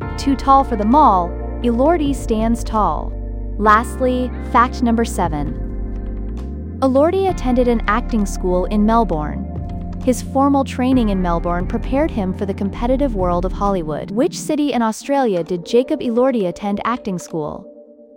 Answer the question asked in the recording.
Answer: Correct answer. Melbourne.